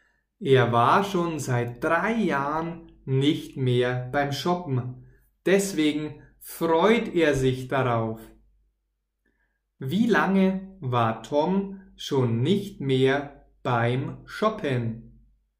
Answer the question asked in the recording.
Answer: Seit drei Jahren er war seit drei Jahren nicht mehr beim Shoppen.